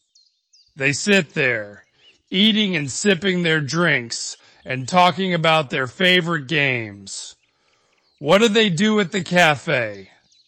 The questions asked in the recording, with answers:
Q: What do they do at the cafe?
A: They sit, eat, sip their drinks, and talk about their favorite games.